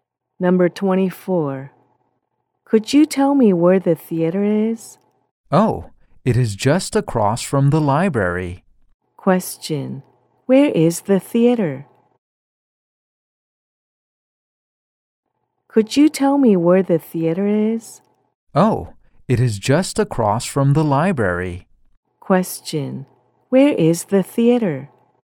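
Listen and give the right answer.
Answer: Across from the library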